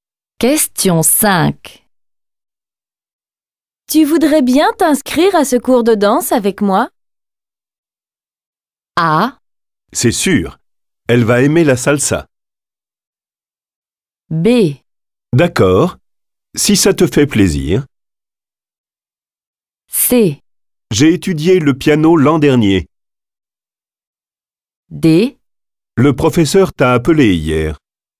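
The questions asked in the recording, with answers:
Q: Tu voudrais bien t'inscrire à ce cours de danse avec moi?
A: B: D'accord. Si ça te fait plaisir.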